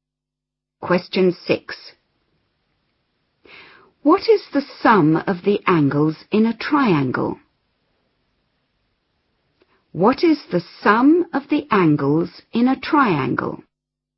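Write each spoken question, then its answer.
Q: What is the sum of the angles in a triangle?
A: 180 degrees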